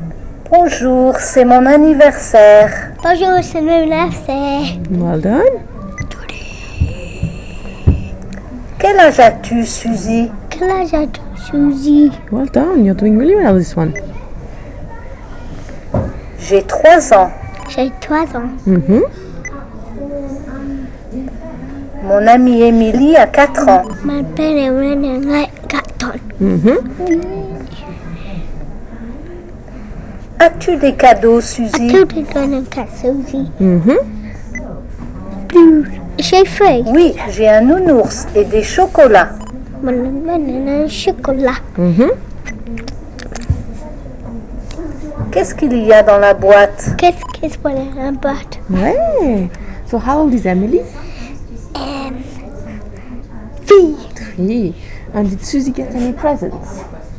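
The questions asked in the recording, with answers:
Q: And did Susie get any presents?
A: Yes, a teddy and chocolates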